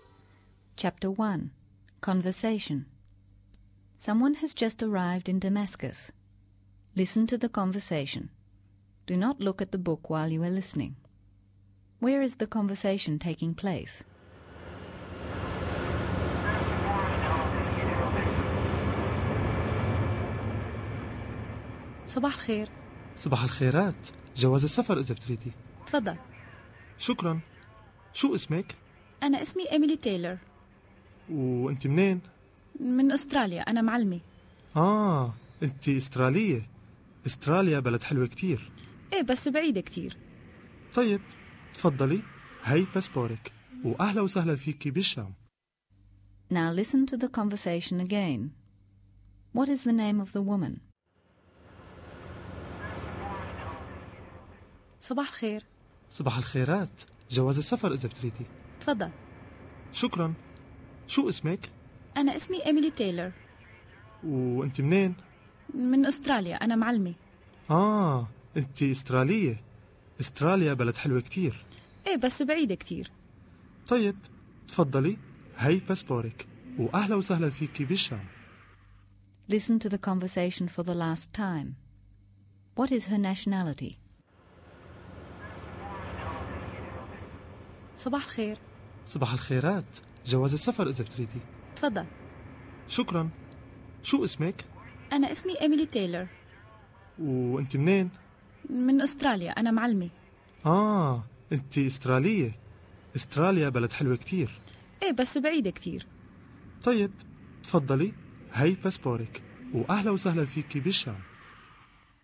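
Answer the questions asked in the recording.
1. At passport control on arrival in Damascus (al-Sham)
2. Emily Taylor
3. Australian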